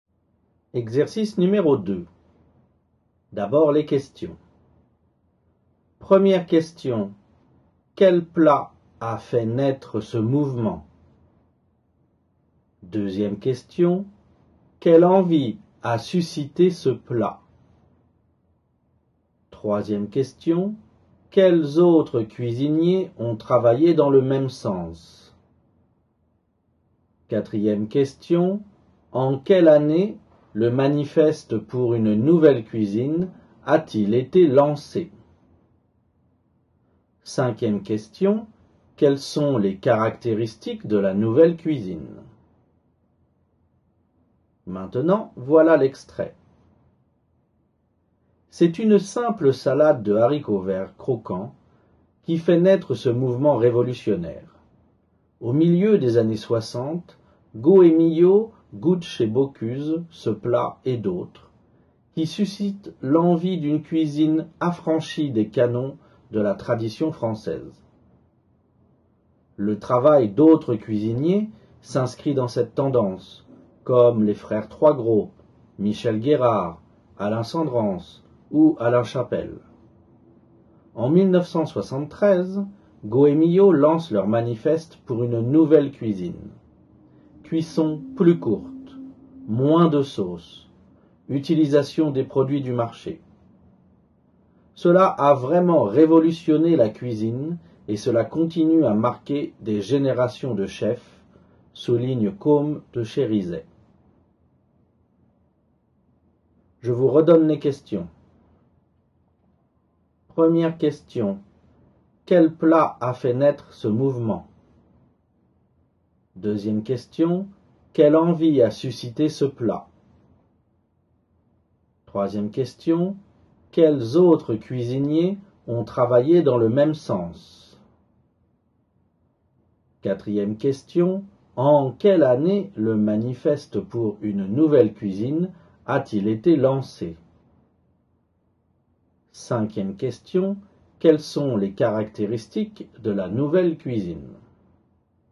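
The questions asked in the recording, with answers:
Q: Quel plat a fait naître ce mouvement?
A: Une simple salade de haricots verts croquants

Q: Quelle envie a suscité ce plat?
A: L'envie d'une cuisine affranchie des canons de la tradition française

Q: Quels autres cuisiniers ont travaillé dans le même sens?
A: Les frères Troisgros, Michel Guérard, Alain Senderens et Alain Chapel

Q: En quelle année le manifeste pour une nouvelle cuisine a-t-il été lancé?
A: En 1973

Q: Quelles sont les caractéristiques de la nouvelle cuisine?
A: Cuisson plus courte, moins de sauce, utilisation des produits du marché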